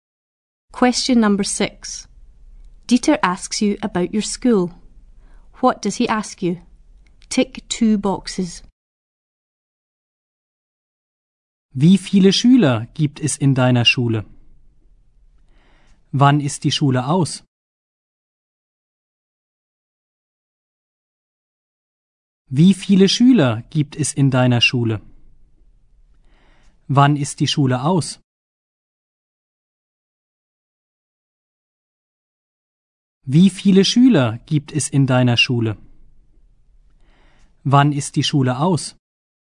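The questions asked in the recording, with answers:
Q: What does he ask you?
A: How many pupils are at your school and when school finishes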